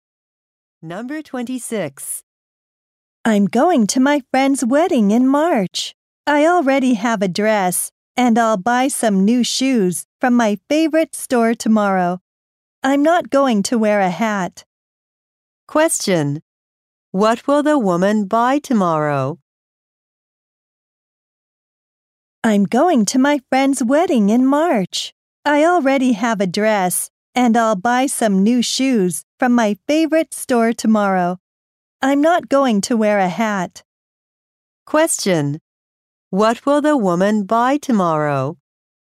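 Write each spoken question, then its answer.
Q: What will the woman buy tomorrow?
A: New shoes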